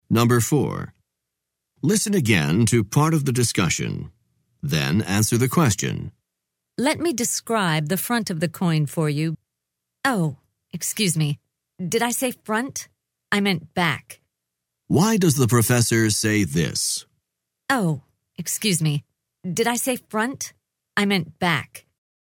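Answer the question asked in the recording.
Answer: To correct her mistake: she meant the back of the coin, not the front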